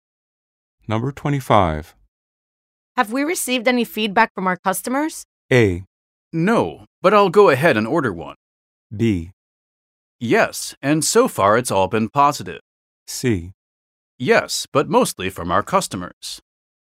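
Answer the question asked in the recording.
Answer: B: Yes, and so far it's all been positive.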